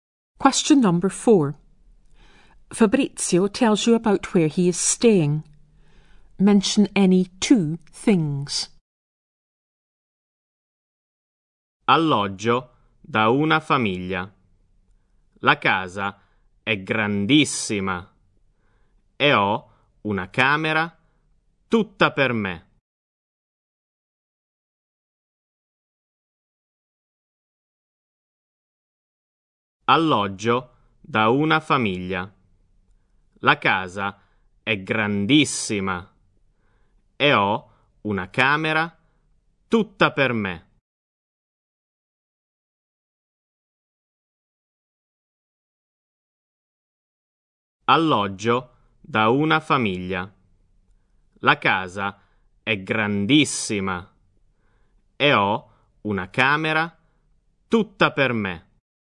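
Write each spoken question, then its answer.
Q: Mention any two things.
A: He stays with a family; the house is very big; he has a room to himself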